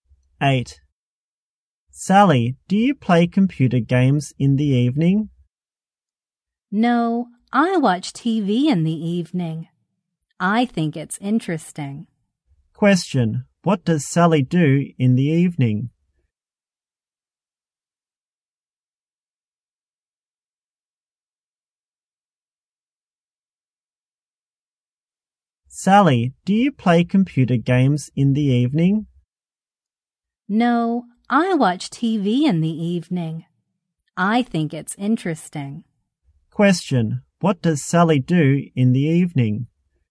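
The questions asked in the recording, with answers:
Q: What does Sally do in the evening?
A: She watches TV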